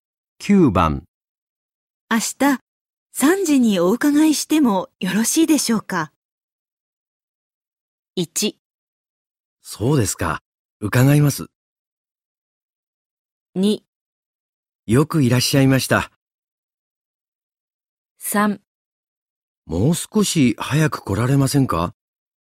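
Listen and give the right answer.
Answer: 3: もう少し早く来られませんか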